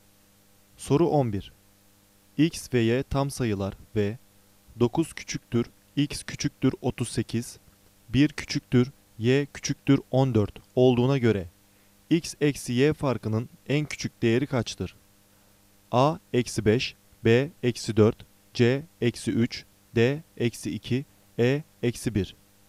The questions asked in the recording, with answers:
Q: X ve Y tam sayılar ve 9 küçüktür, X küçüktür 38, 1 küçüktür, Y küçüktür 14 olduğuna göre X eksi Y farkının en küçük değeri kaçtır?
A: Doğru cevap C, eksi 3.